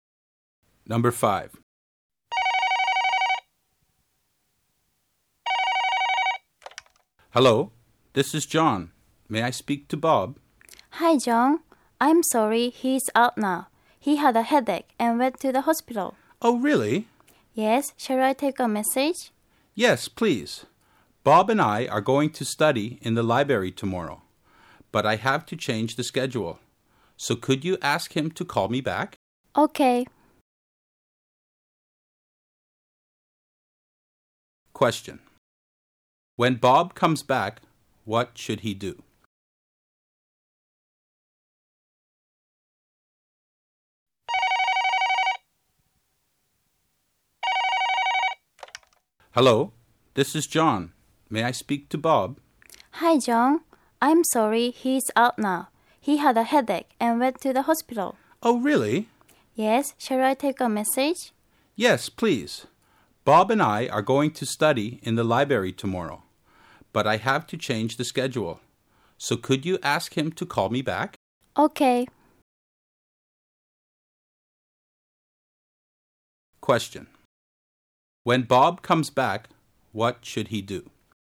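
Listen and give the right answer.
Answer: Call John back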